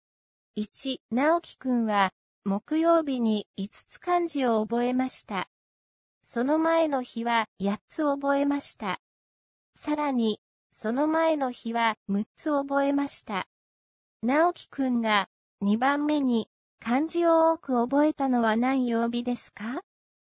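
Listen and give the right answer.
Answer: 火曜日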